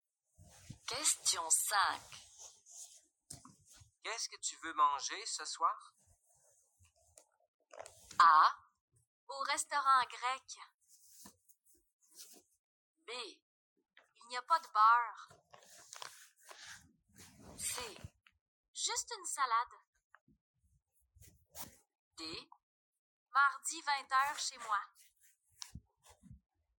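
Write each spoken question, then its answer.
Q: Qu'est-ce que tu veux manger ce soir?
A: C: Juste une salade.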